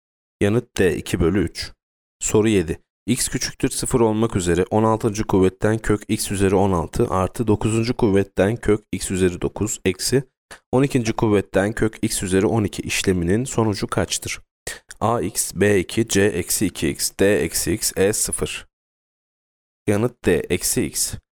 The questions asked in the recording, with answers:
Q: kuvvetten kök x üzeri 12 işleminin sonucu kaçtır?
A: Yanıt D-x.